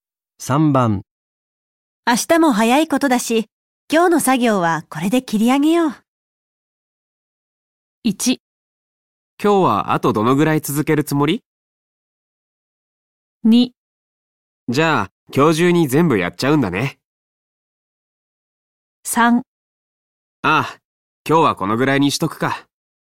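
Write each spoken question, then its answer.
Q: 明日も早いことだし、今日の作業はこれで切り上げよう。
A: 3: ああ、今日はこのぐらいにしとくか。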